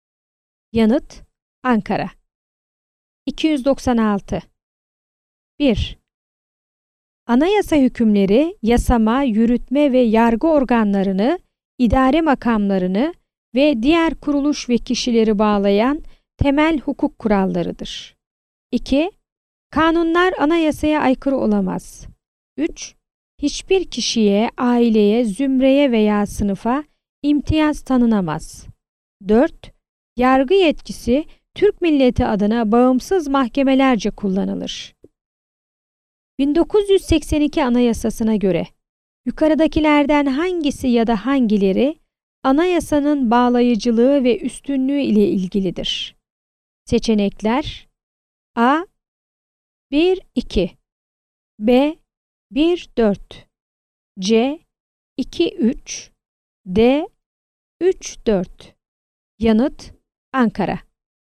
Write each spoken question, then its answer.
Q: 1982 Anayasası'na göre yukarıdakilerden hangisi ya da hangileri anayasanın bağlayıcılığı ve üstünlüğü ile ilgilidir?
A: Yanıt: Ankara.